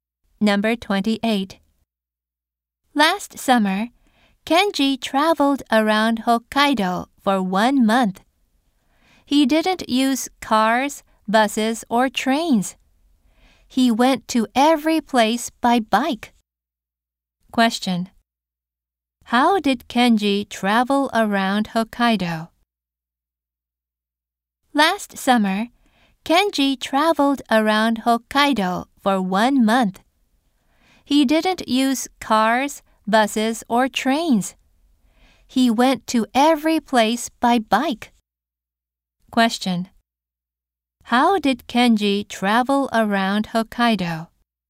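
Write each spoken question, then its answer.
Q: Question. How did Kenji travel around Hokkaido?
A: By bike.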